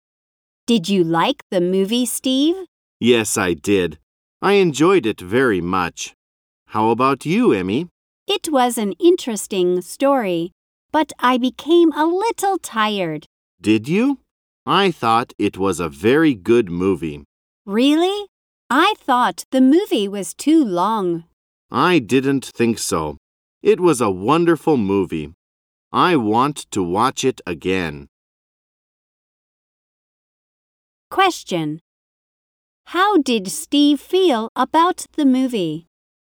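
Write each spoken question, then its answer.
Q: How did Steve feel about the movie?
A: He thought it was a very good (wonderful) movie.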